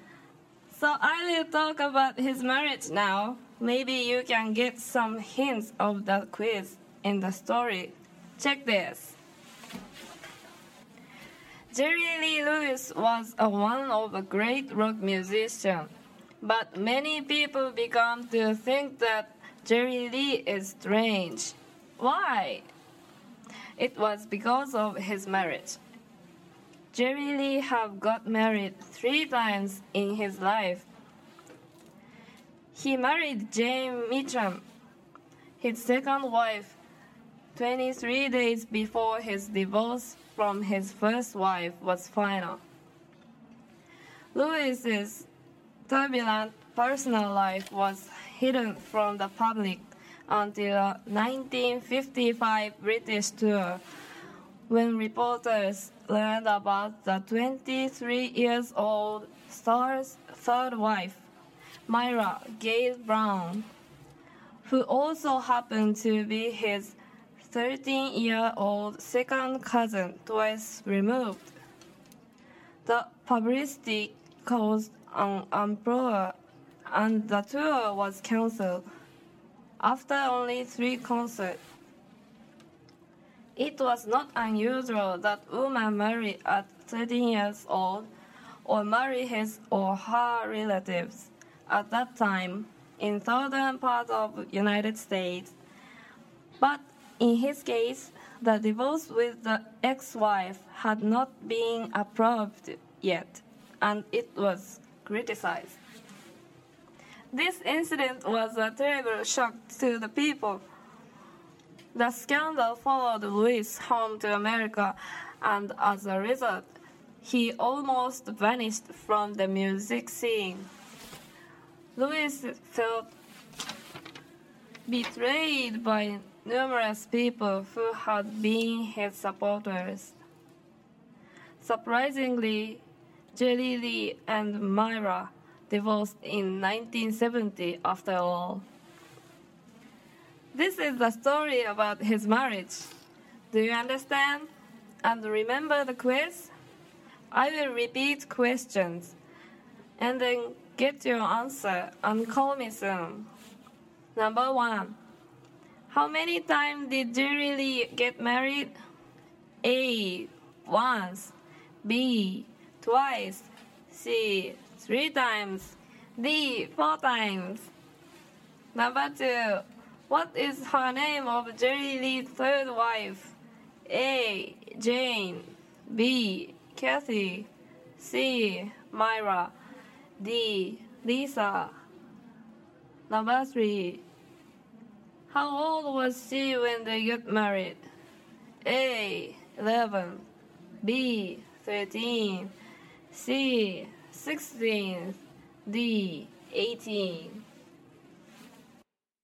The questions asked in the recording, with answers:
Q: How many times did Jerry Lee get married?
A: C three times.

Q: What is her name of Jerry Lee's third wife?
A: Myra, is okay?

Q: How old was she when they got married?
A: 13 years old is correct.